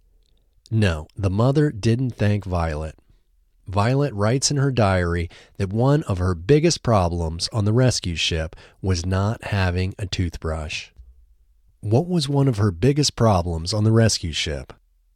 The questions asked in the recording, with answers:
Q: What was one of her biggest problems on the rescue ship?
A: One of her biggest problems on the rescue ship was not having a toothbrush.